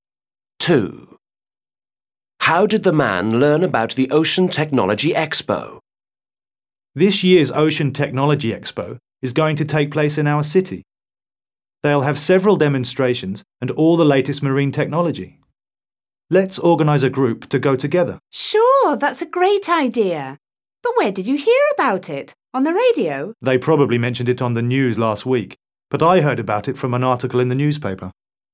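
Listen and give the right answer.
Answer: From a newspaper article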